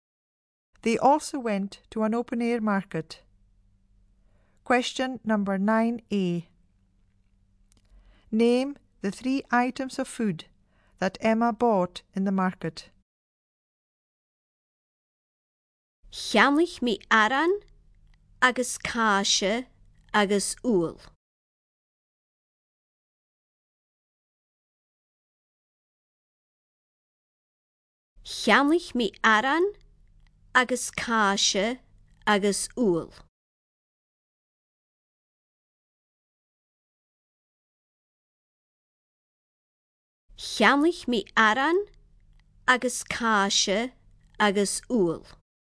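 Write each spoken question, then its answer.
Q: Name the 3 items of food that Emma bought in the market.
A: Bread, cheese and eggs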